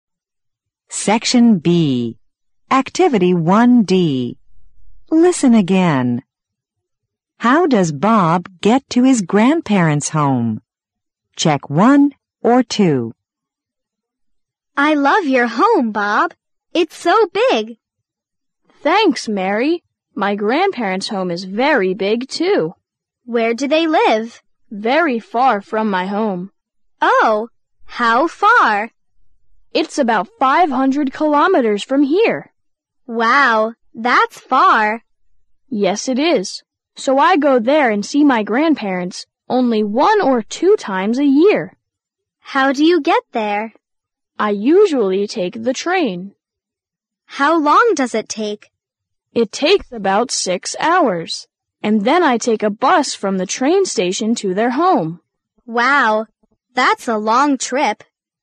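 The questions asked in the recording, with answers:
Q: How does Bob get to his grandparents' home?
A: He takes the train, then a bus from the station.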